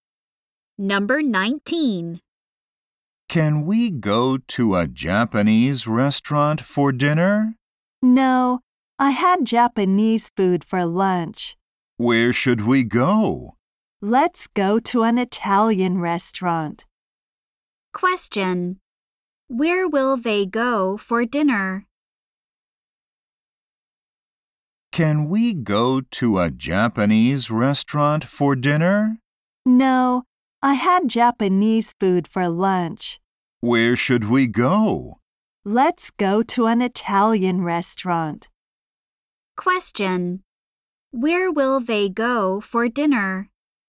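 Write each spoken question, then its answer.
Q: Where will they go for dinner?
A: To an Italian restaurant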